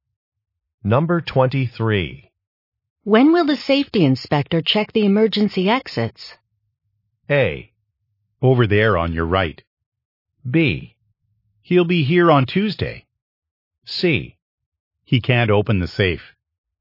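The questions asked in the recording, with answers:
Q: When will the safety inspector check the emergency exits?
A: B: He'll be here on Tuesday.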